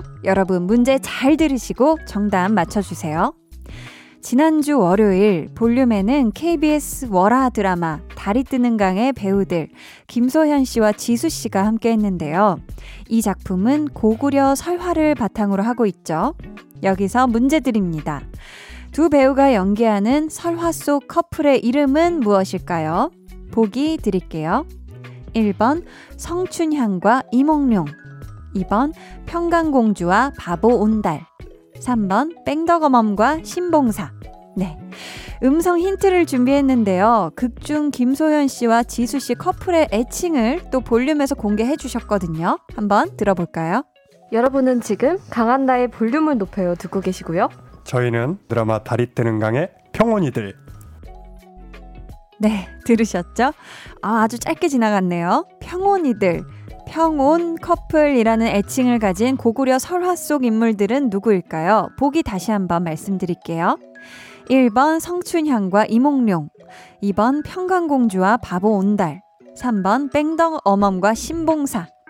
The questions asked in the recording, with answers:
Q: 두 배우가 연기하는 설화 속 커플의 이름은 무엇일까요?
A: 정답은 2번 평강공주와 바보 온달이었습니다.